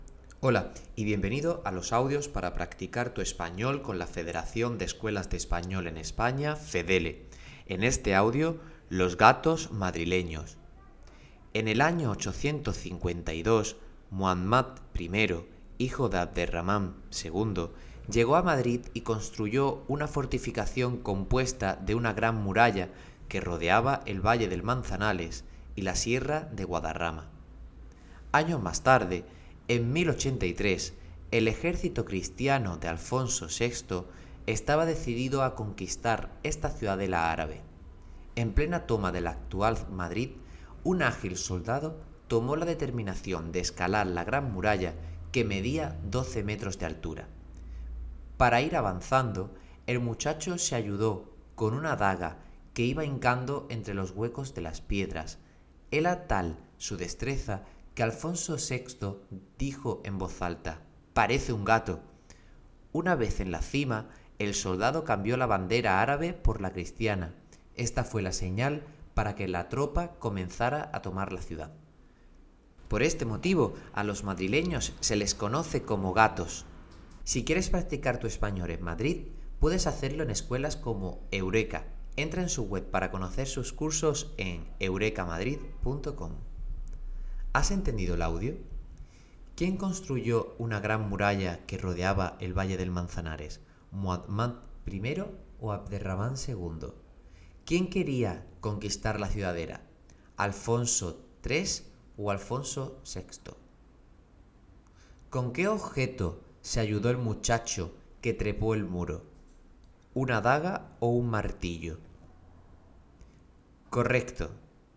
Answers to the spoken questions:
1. Muhammad I
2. Alfonso VI
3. una daga